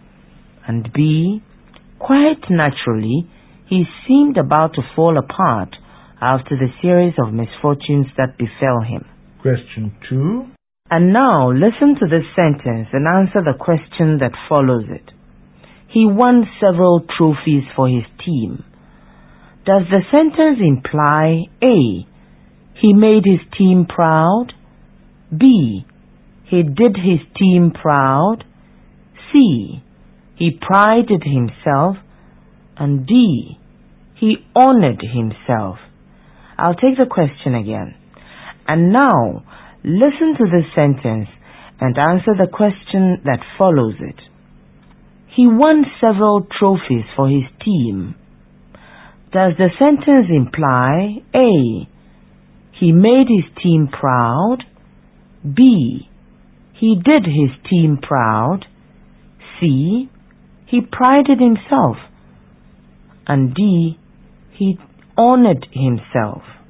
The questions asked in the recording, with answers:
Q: Does the sentence imply A.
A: The sentence means A, he made his team proud.